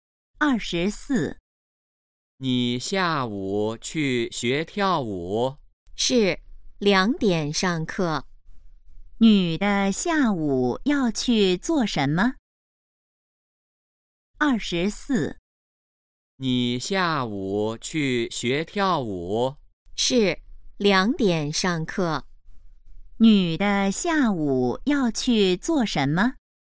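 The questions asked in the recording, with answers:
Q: 女的下午要去做什么?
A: 学跳舞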